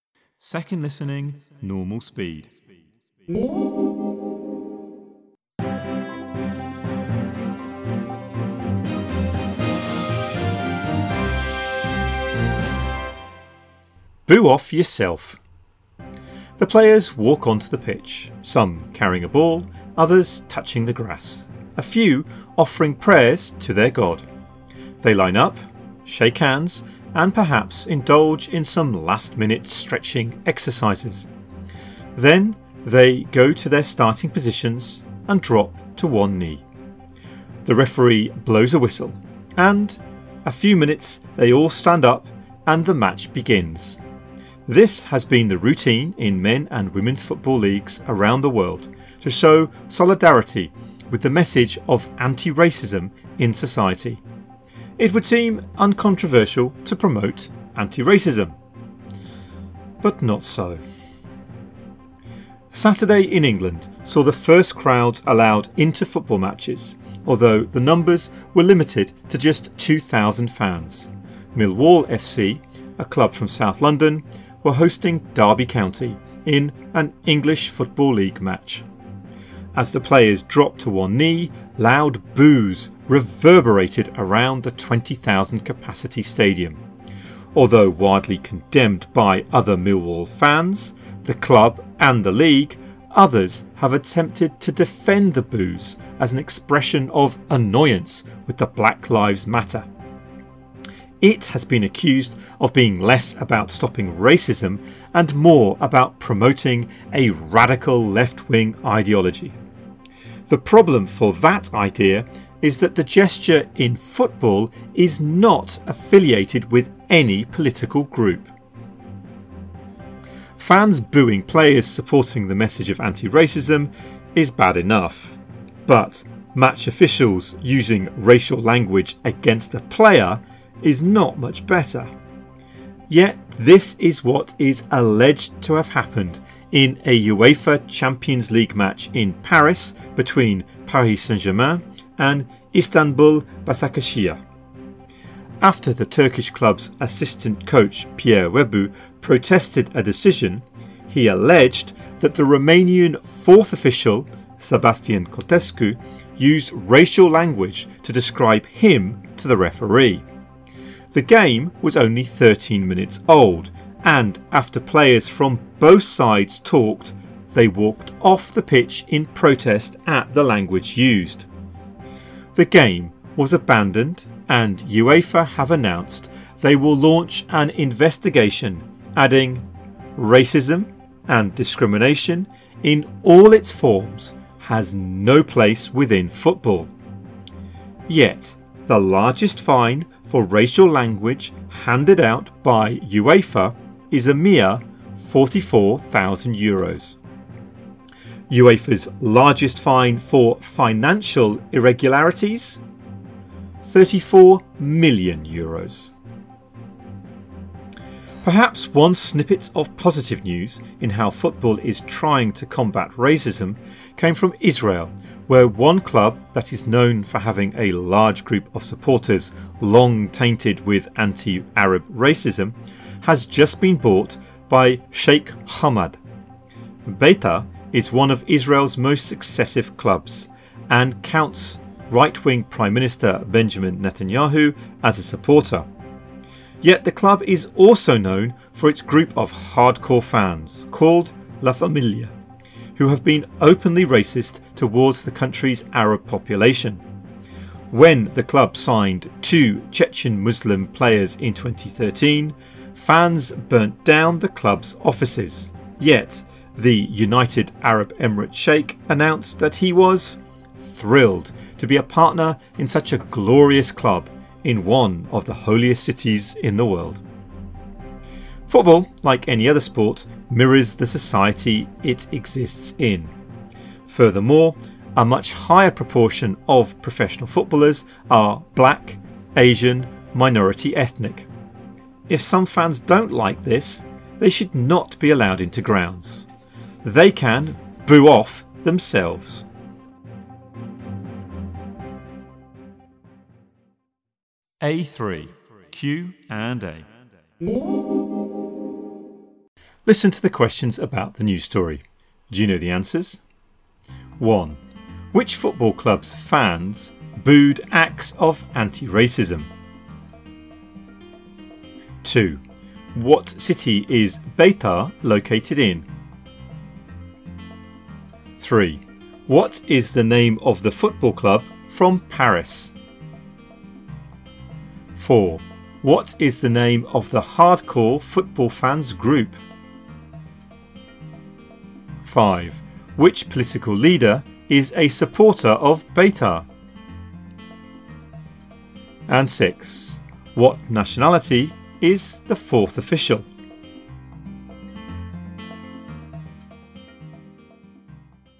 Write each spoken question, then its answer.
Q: Which football club's fans booed acts of anti-racism?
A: 1, Millwall FC.

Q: What is the name of the football club from Paris?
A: 3, Paris Saint-Germain, PSG.

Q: What is the name of the hardcore football fans group?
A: 4, La Familia.

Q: Which political leader is a supporter of Beitar?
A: 5, Benjamin Netanyahu.

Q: What nationality is the fourth official?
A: 6, Romanian.